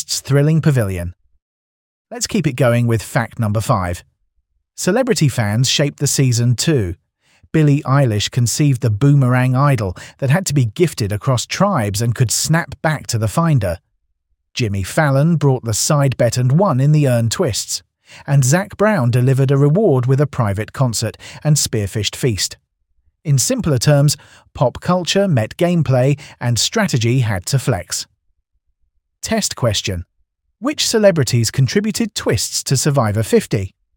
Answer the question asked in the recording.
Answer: Billie Eilish, Jimmy Fallon and Zac Brown.